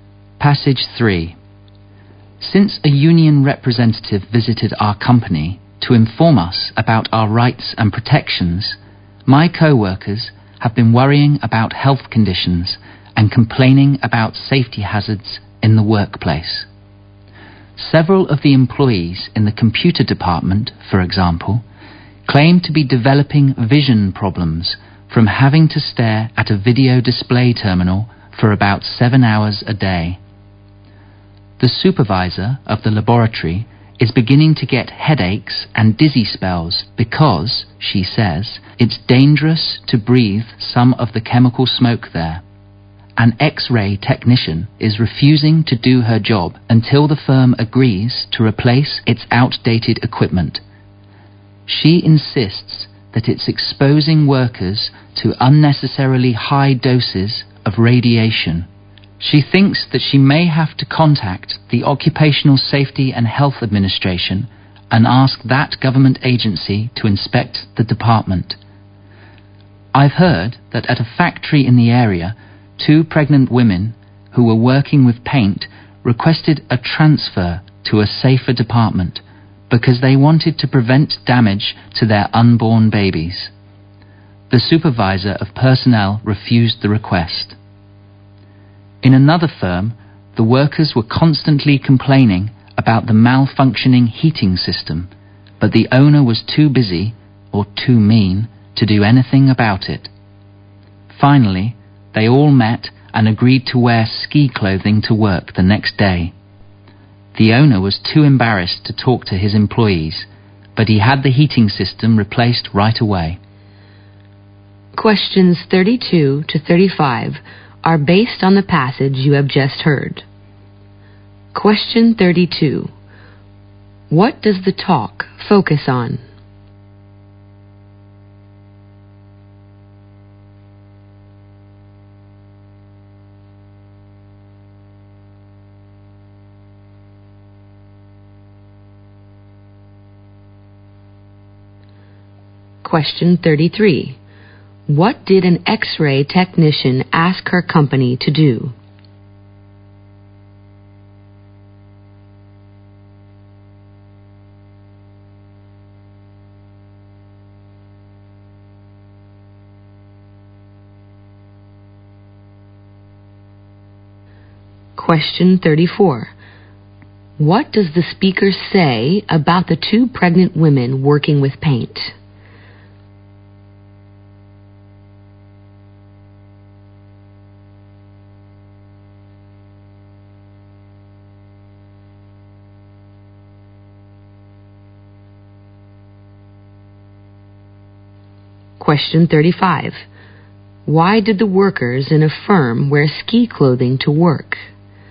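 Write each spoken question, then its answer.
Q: What does the talk focus on?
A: Health and safety hazards at work.

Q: What did an X-ray technician ask her company to do?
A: Replace its outdated equipment.

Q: What does the speaker say about the two pregnant women working with paint?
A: They asked for a transfer to a safer department, but it was refused.

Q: Why did the workers in a firm wear ski clothing to work?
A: To protest the broken heating system.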